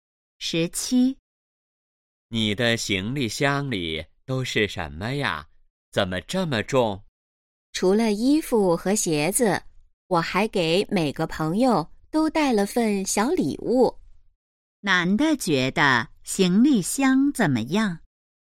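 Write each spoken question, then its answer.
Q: 男的觉得行李箱怎么样?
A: 很重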